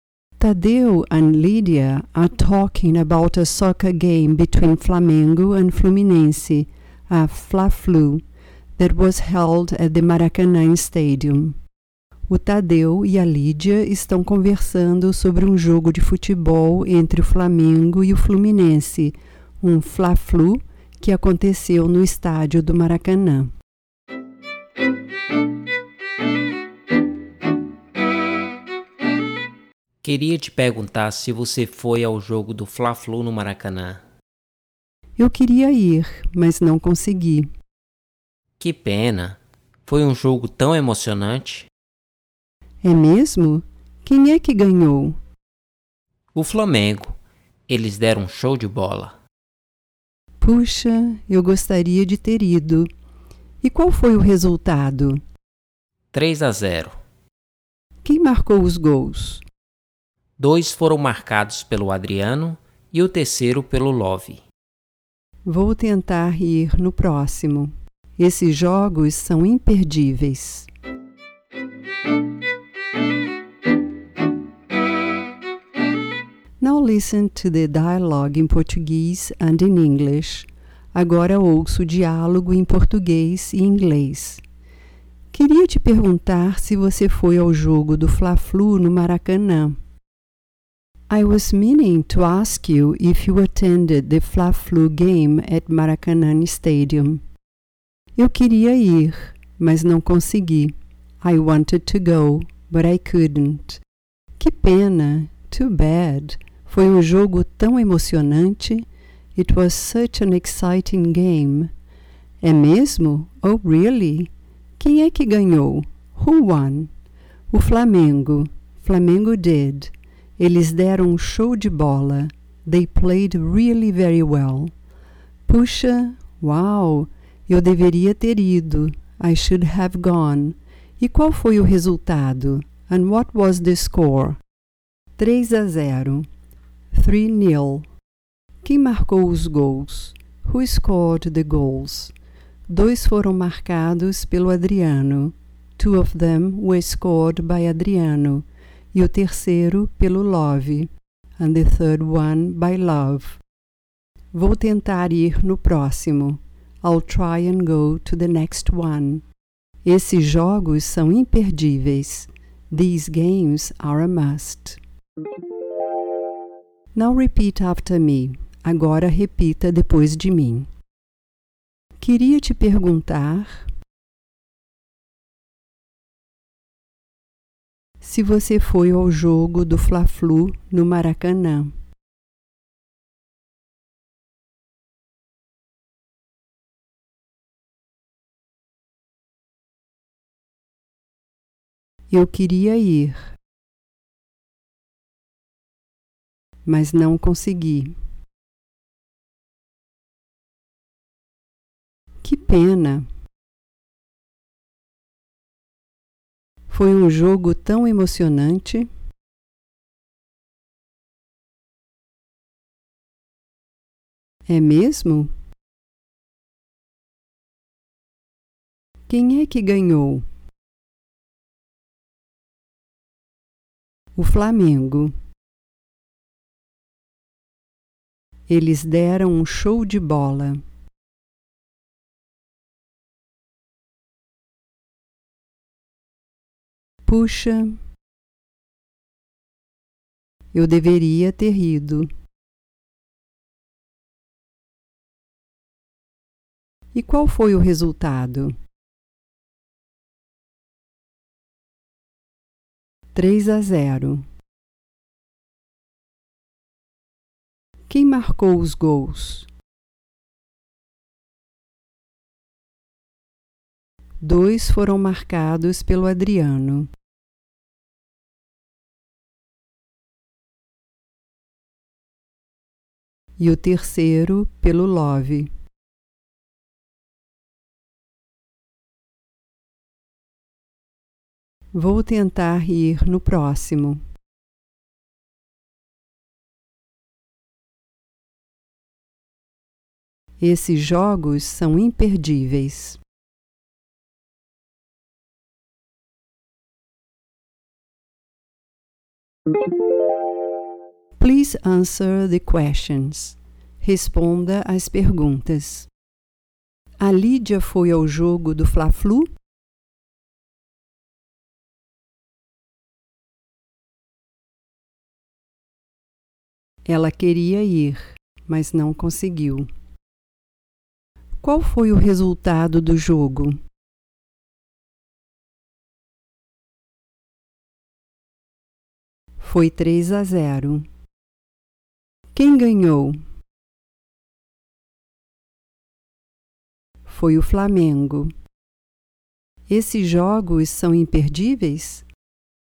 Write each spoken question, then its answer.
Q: A Lídia foi ao jogo do Fla-Flu?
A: Ela queria ir, mas não conseguiu.

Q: Qual foi o resultado do jogo?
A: 3-0.

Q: Quem ganhou?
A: Foi o Flamengo.

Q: Esses jogos são imperdíveis?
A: São.